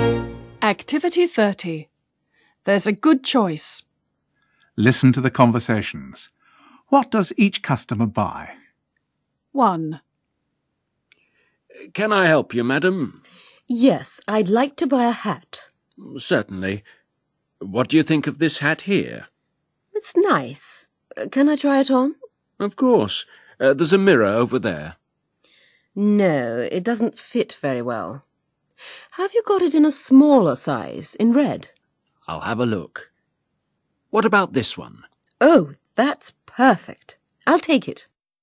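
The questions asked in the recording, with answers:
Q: What does each customer buy?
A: a smaller red hat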